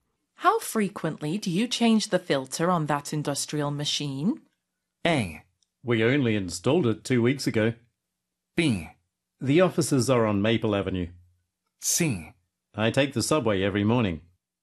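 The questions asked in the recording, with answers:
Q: How frequently do you change the filter on that industrial machine?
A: A: We only installed it 2 weeks ago.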